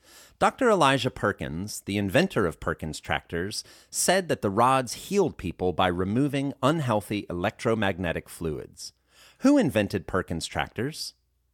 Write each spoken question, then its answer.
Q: Who invented Perkins tractors?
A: Dr. Elijah Perkins invented Perkins tractors.